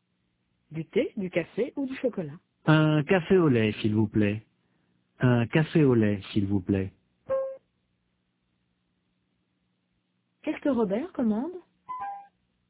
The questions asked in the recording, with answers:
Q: Qu'est-ce que Robert commande?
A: Un café au lait.